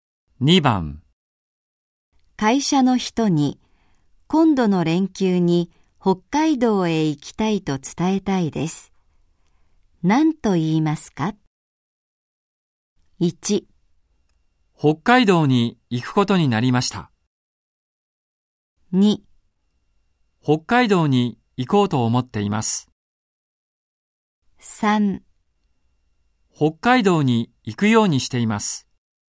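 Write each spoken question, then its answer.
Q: 会社の人に今度の連休に北海道へ行きたいと伝えたいです。 何と言いますか?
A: 2: 北海道に行こうと思っています。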